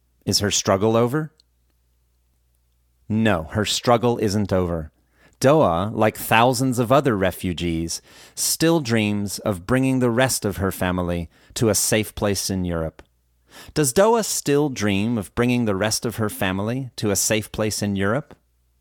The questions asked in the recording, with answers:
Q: Does Doa still dream of bringing the rest of her family to a safe place in Europe?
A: Yes, Doa still dreams of bringing the rest of her family to a safe place in Europe.